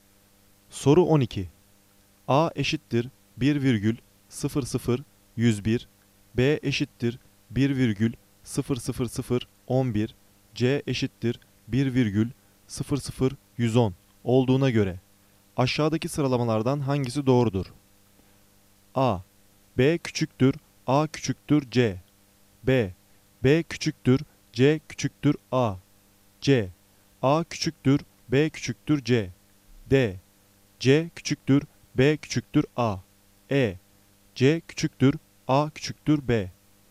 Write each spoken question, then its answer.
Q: A eşittir 1,00101, B eşittir 1,00011, C eşittir 1,00110 olduğuna göre aşağıdaki sıralamalardan hangisi doğrudur?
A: Doğru cevap A. B küçüktür, A küçüktür, C.